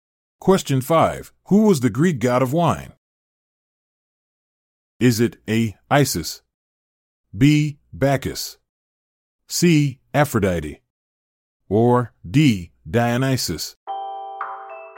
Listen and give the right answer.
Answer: The answer is D. Dionysus.